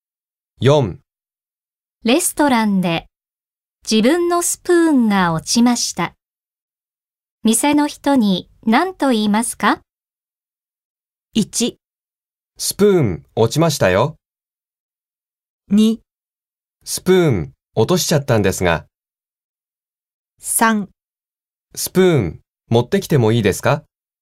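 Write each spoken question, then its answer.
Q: レストランで自分のスプーンが落ちました。店の人に何と言いますか?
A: 2: スプーン落としちゃったんですが。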